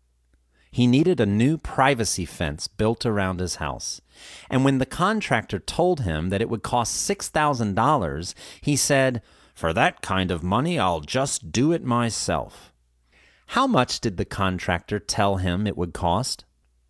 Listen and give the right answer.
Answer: The contractor said it would cost $6,000.